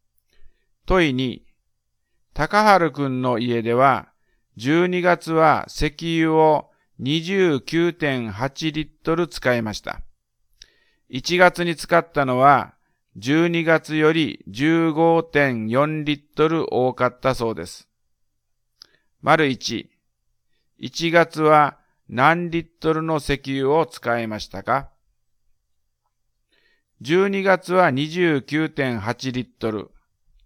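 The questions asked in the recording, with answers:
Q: 1月は何リットルの石油を使いましたか?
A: 45.2リットル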